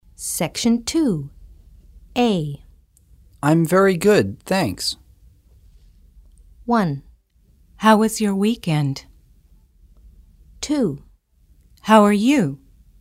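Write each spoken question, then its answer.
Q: I'm very good, thanks.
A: 2: How are you?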